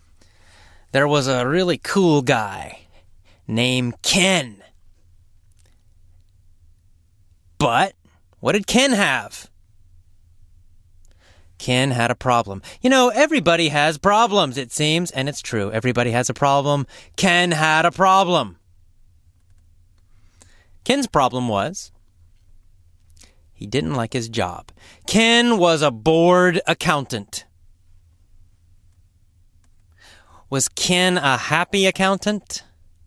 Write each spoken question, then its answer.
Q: Was Ken a happy accountant?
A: No, he was a bored accountant.